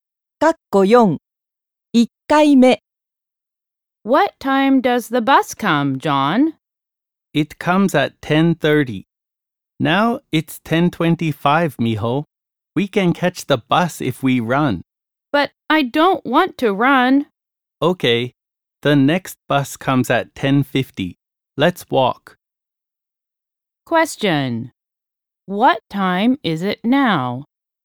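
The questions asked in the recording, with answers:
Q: What time is it now?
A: 10:25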